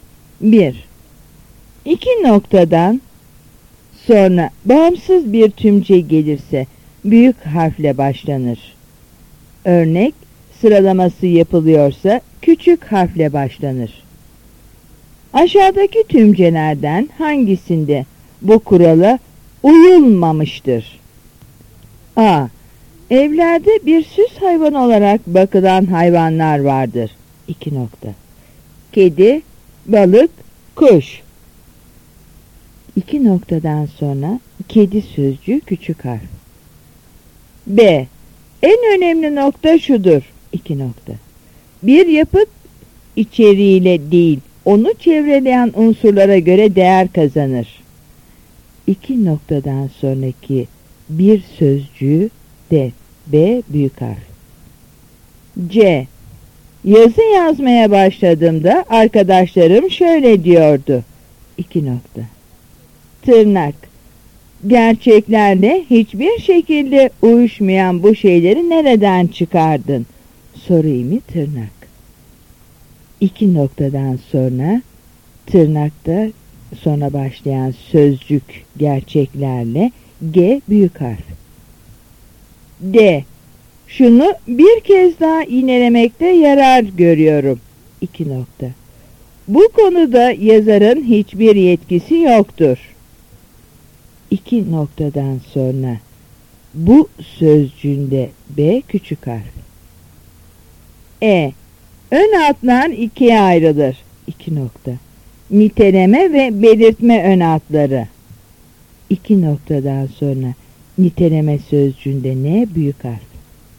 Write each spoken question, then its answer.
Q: Aşağıdaki tümcelerden hangisinde bu kurala uyulmamıştır?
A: Yanıt D.